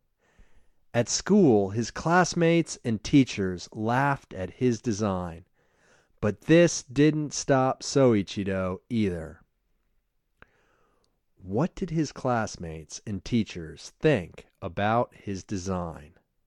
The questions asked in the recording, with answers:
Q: What did his classmates and teachers think about his design?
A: They laughed at his design.